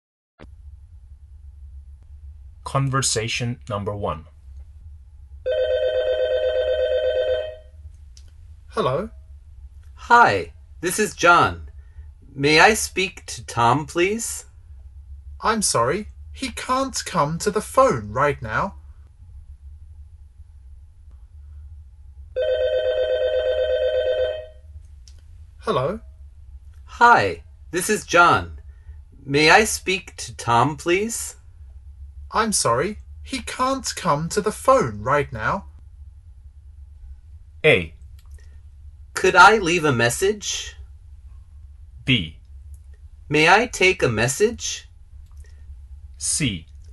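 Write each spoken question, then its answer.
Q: I'm sorry, he can't come to the phone right now.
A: A: Could I leave a message?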